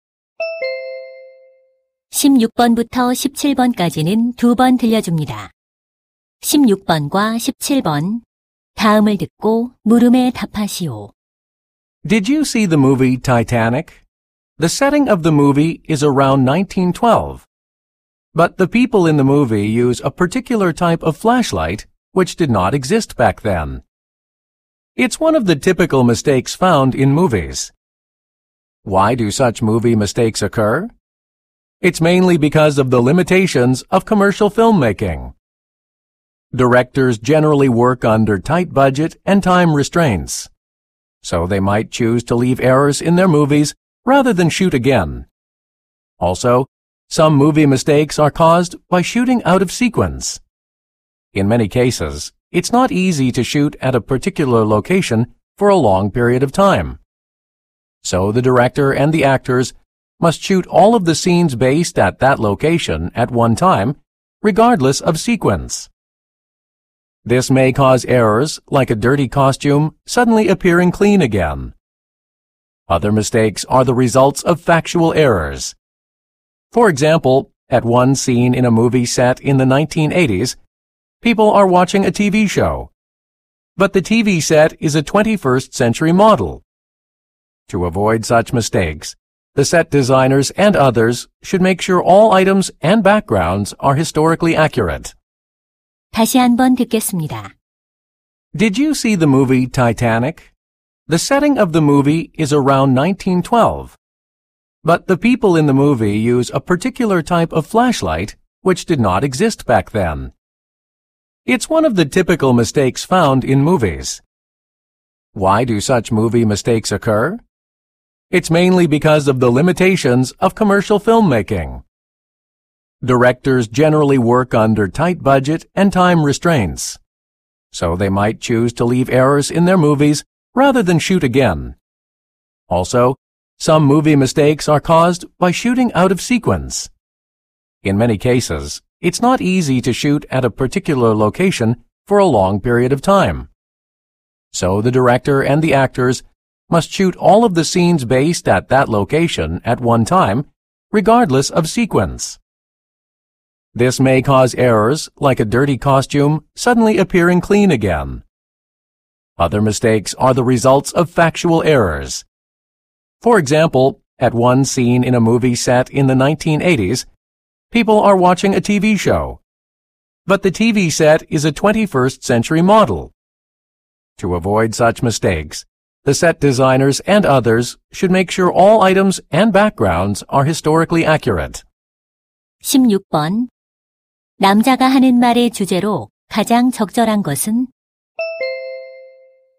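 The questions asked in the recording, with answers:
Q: 남자가 하는 말의 주제로 가장 적절한 것은?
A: 영화 속 오류가 생기는 원인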